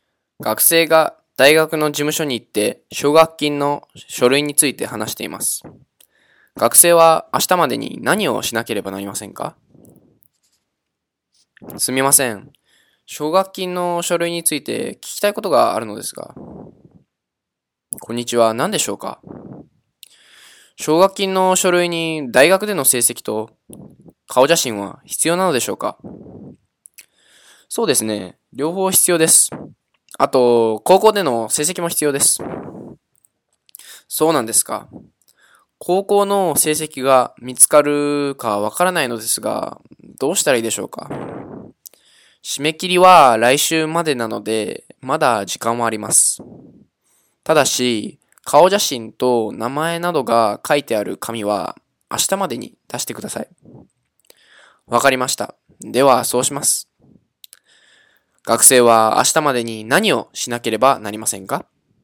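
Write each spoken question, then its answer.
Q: 学生は明日までに何をしなければなりませんか?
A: 顔写真と名前などが書いてある紙を出す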